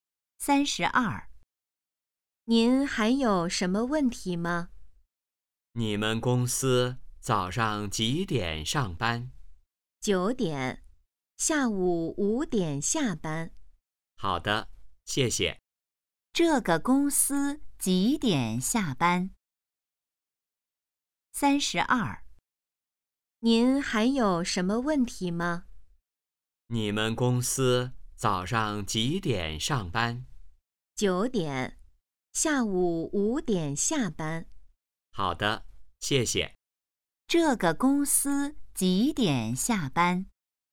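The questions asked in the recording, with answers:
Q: 这个公司几点下班?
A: 下午5点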